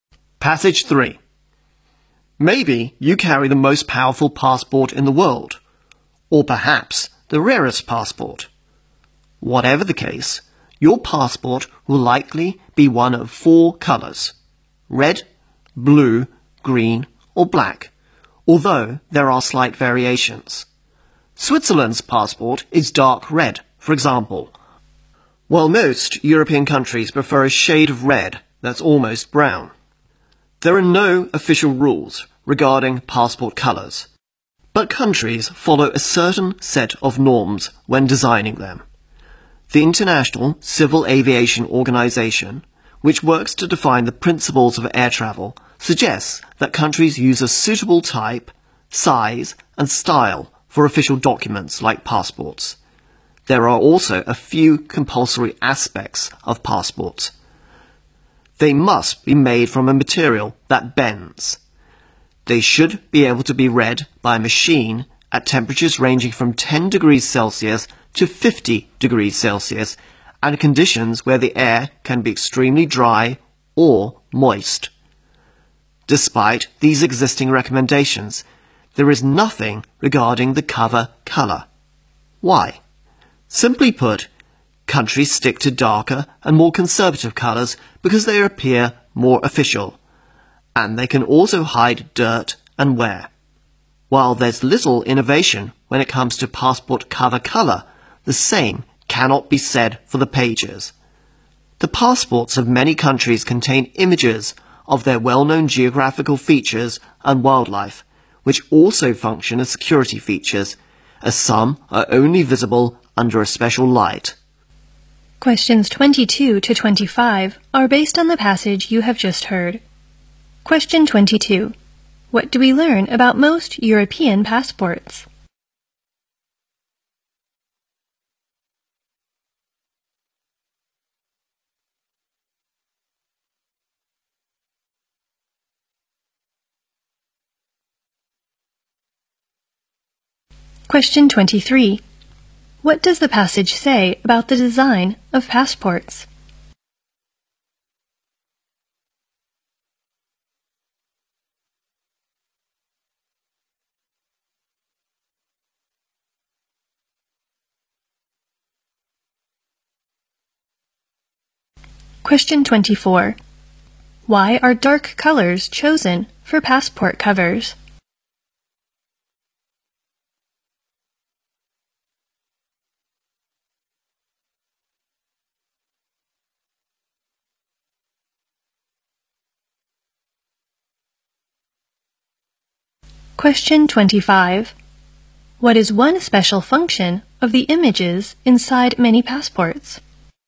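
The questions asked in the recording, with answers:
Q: What do we learn about most European passports?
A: They are a shade of red that's almost brown

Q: Why are dark colors chosen for passport covers?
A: They look more official and hide dirt and wear

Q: What is one special function of the images inside many passports?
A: They serve as security features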